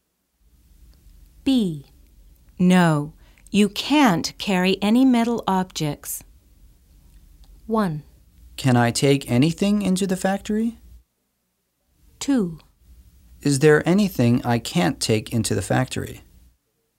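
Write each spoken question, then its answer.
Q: No. You can't carry any metal objects.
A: 1: Can I take anything into the factory?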